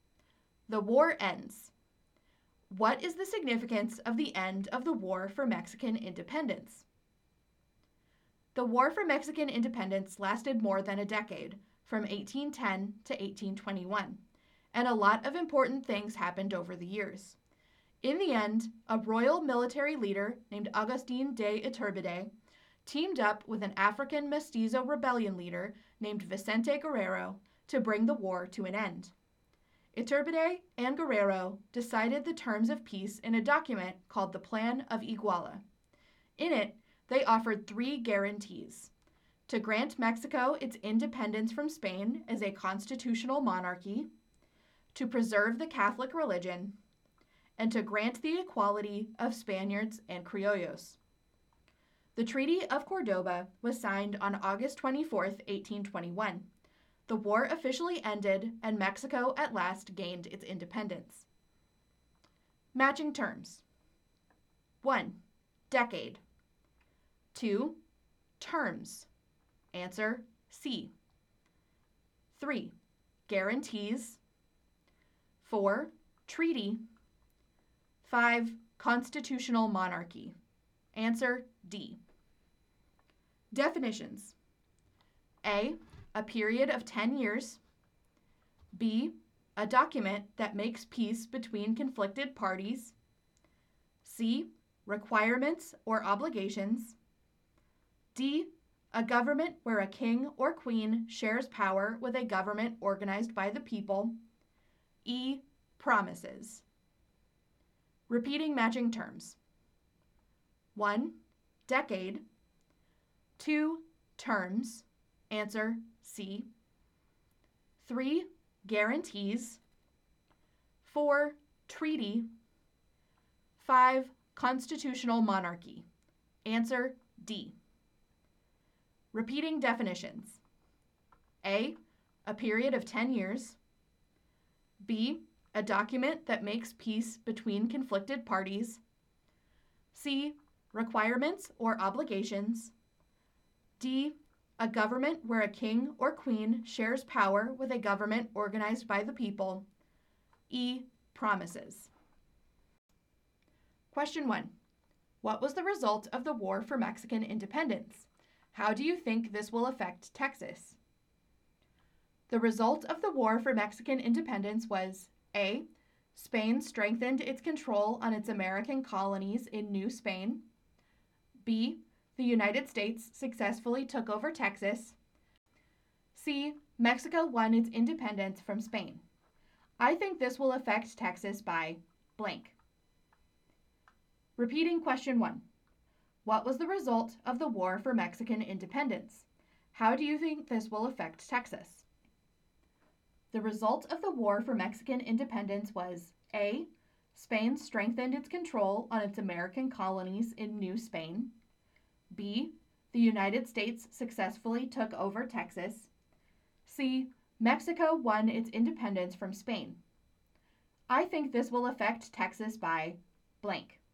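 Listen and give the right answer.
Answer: C: Mexico won its independence from Spain.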